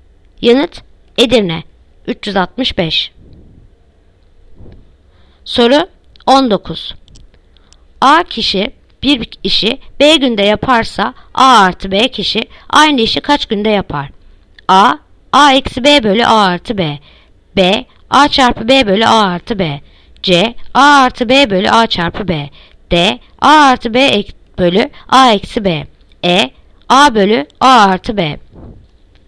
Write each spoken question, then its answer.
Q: A kişi bir işi B günde yaparsa A artı B kişi aynı işi kaç günde yapar?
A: Yanıt Bursa. A çarpı B bölü A artı B.